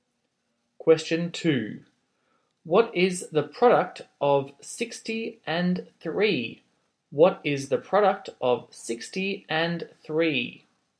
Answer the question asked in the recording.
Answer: your answer is 180.